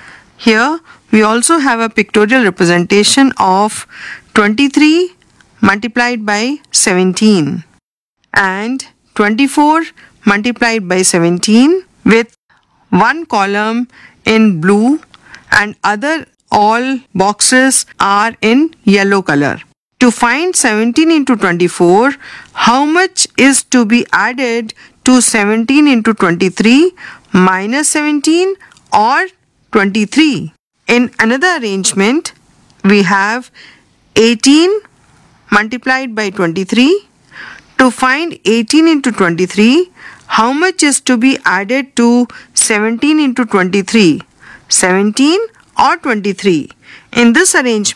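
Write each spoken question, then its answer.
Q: To find 17 into 24, how much is to be added to 17 into 23 minus 17 or 23?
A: 17

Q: To find 18 into 23, how much is to be added to 17 into 23? 17 or 23?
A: 23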